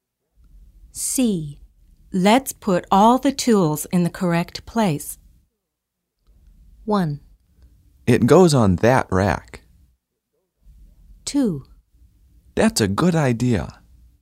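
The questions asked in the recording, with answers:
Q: Let's put all the tools in the correct place.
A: 2: That's a good idea.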